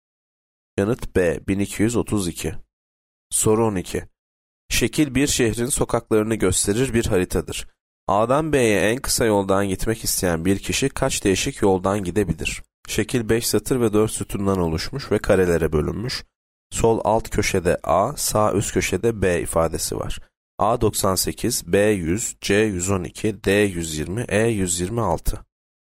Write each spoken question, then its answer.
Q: A'dan B'ye en kısa yoldan gitmek isteyen bir kişi kaç değişik yoldan gidebilir?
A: Yanıt E 126.